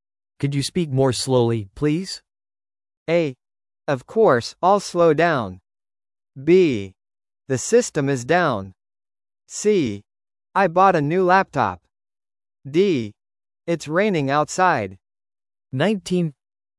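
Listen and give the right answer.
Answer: A: Of course, I'll slow down.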